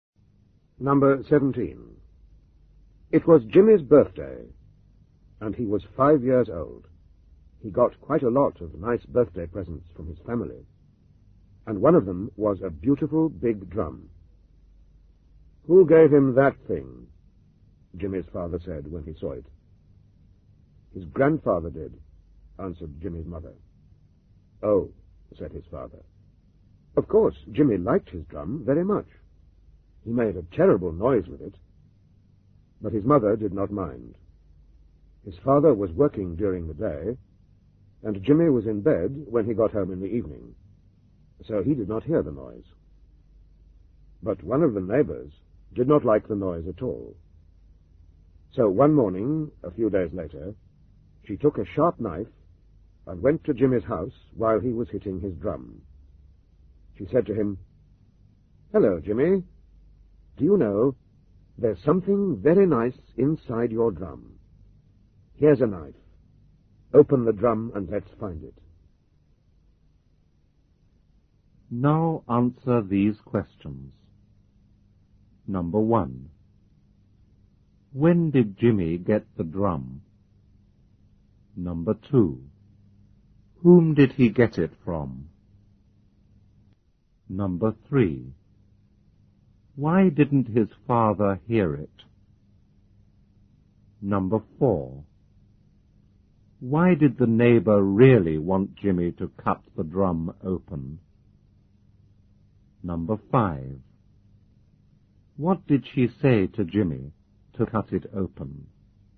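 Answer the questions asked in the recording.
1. On his fifth birthday
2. His grandfather
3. He was working during the day, and Jimmy was in bed when he got home
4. She did not like the noise and wanted it to stop
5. That there was something very nice inside the drum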